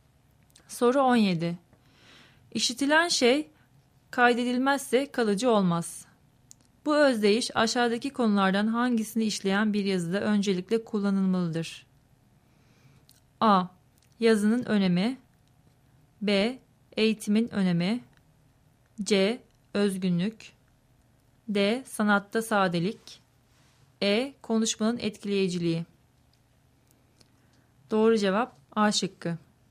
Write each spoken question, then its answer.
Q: Bu özdeyiş aşağıdaki konulardan hangisini işleyen bir yazıda öncelikle kullanılmalıdır?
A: Doğru cevap A şıkkı.